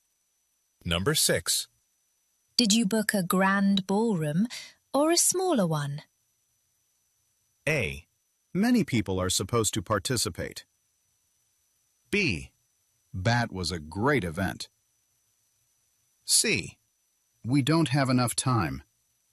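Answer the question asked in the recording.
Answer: A: Many people are supposed to participate.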